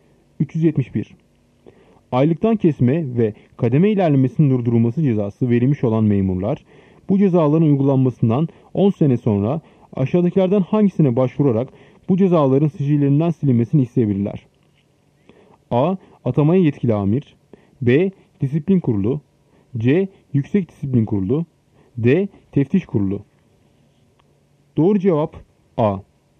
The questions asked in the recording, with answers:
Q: Aylıktan kesme ve kademe ilerlemesinin durdurulması cezası verilmiş olan memurlar, bu cezaların uygulanmasından 10 sene sonra aşağıdakilerden hangisine başvurarak bu cezaların sicillerinden silinmesini isteyebilirler?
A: Doğru cevap A. Atamaya yetkili amir.